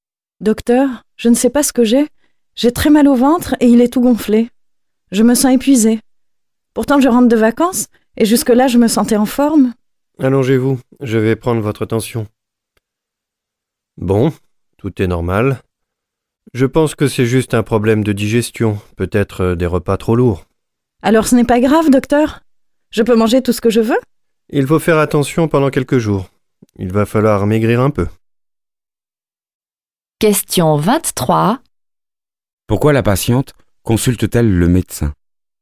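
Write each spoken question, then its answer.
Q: Pourquoi la patiente consulte-t-elle le médecin?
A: Elle a très mal au ventre, il est gonflé, et elle se sent épuisée.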